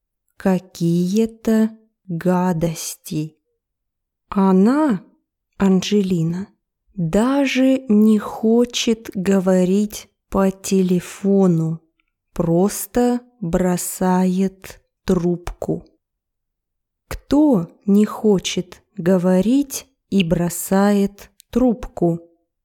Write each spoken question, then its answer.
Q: Кто не хочет говорить и бросает трубку?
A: Анджелина Джоли не хочет говорить и бросает трубку.